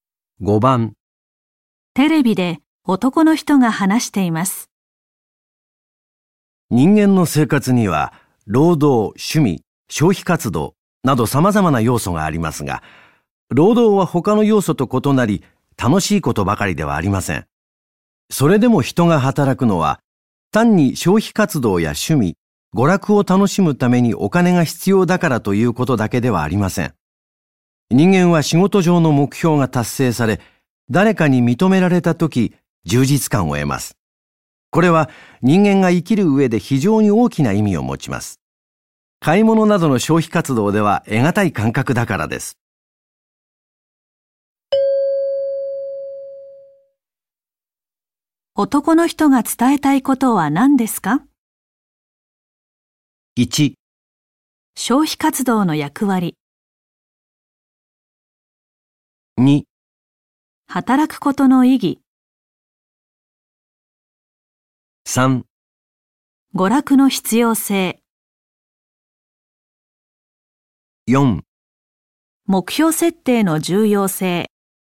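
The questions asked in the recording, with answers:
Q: 男の人が伝えたいことは何ですか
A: 2: 働くことの意義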